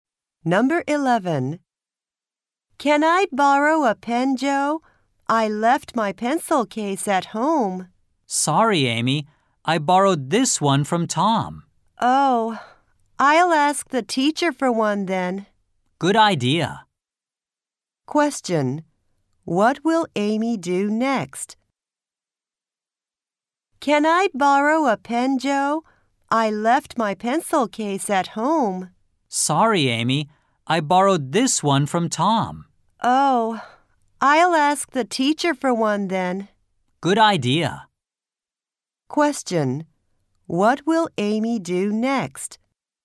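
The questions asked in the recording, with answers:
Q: What will Amy do next?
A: Ask the teacher for a pen.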